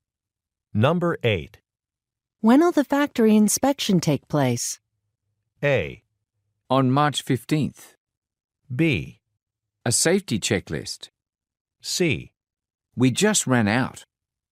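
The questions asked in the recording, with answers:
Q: When will the factory inspection take place?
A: A: On March 15th.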